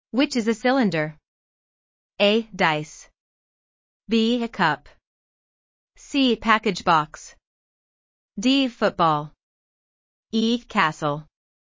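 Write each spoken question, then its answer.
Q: Which is a cylinder?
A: B: A cup.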